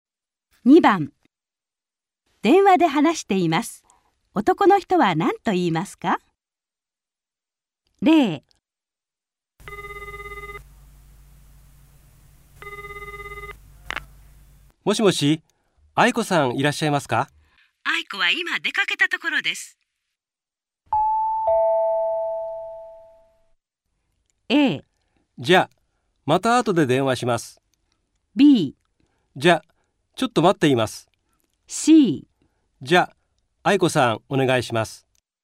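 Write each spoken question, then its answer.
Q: 男の人は何と言いますか?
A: A: じゃあ、また後で電話します。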